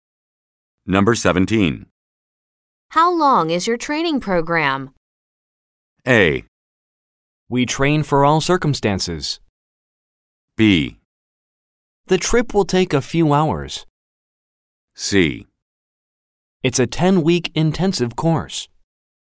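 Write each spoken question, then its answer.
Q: How long is your training program?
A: C: It's a 10-week intensive course.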